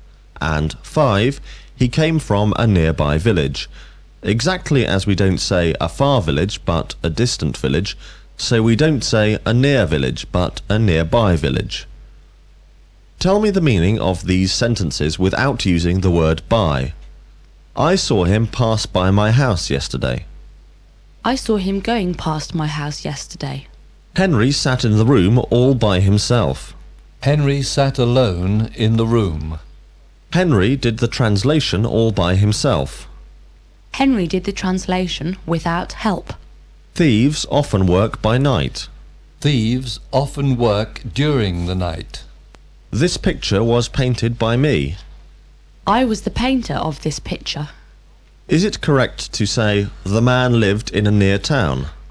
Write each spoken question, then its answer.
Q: Is it correct to say the man lived in a near town?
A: No, it isn't correct to say the man lived in a near town.